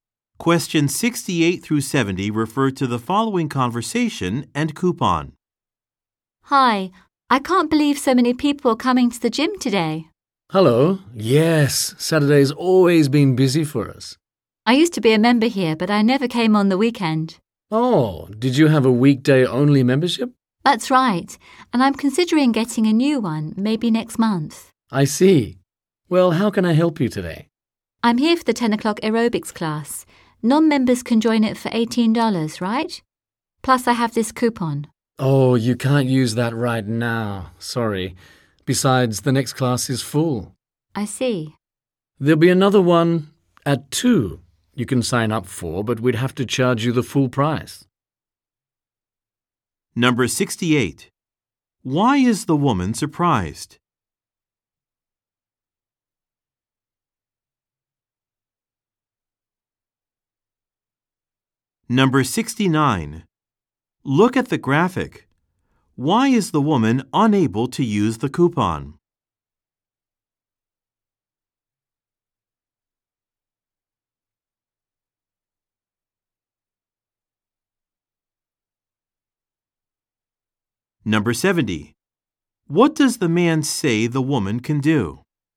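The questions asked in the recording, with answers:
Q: Why is the woman surprised?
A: So many people are at the gym

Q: What does the man say the woman can do?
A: Sign up for the 2 o'clock class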